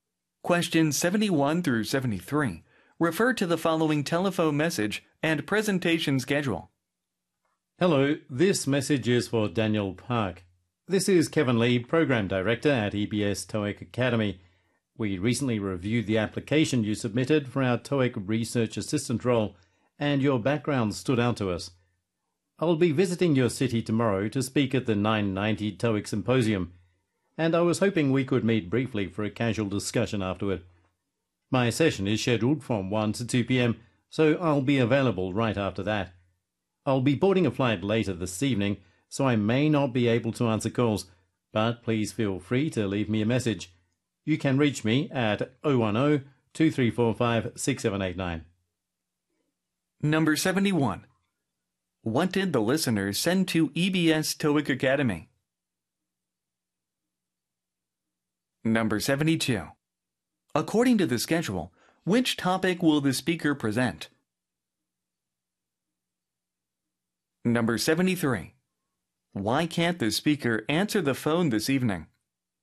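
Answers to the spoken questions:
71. A job application
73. He will be on a flight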